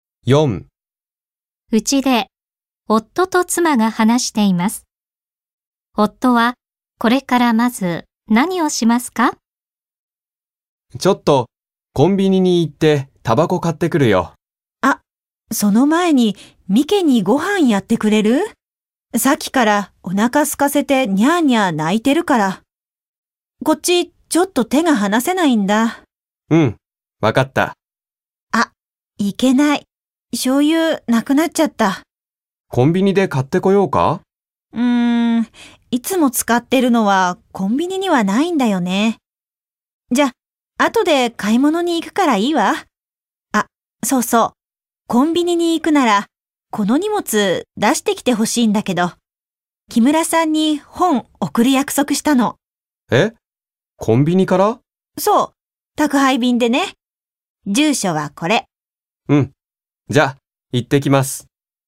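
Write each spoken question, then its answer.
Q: 夫はこれからまず何をしますか?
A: 猫のミケにご飯をやる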